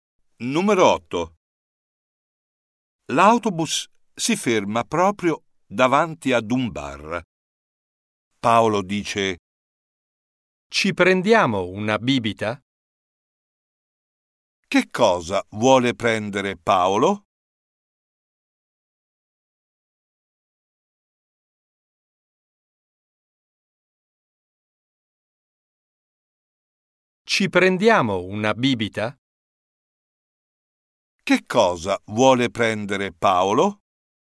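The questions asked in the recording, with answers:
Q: Che cosa vuole prendere Paolo?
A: una bibita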